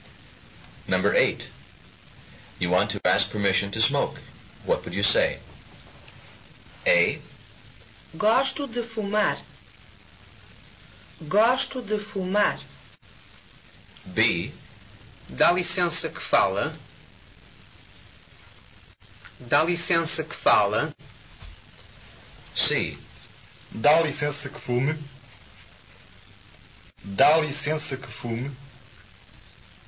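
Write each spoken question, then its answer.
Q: You want to ask permission to smoke.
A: C: Dá licença que fume.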